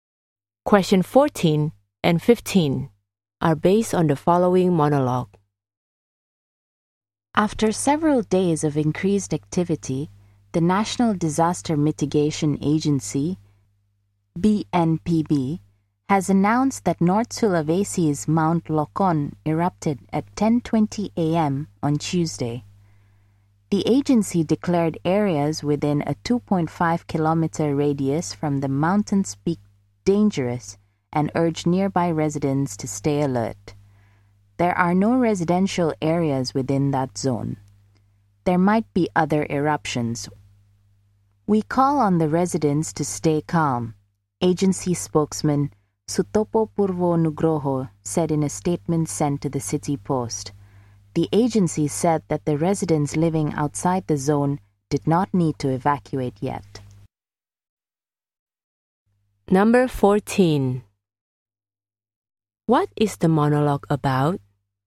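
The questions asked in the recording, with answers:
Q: What is the monologue about?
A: The eruption of Mount Lokon in North Sulawesi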